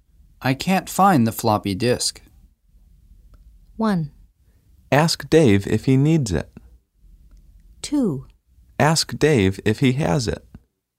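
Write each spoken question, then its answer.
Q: I can't find the floppy disk.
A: 2: Ask Dave if he has it.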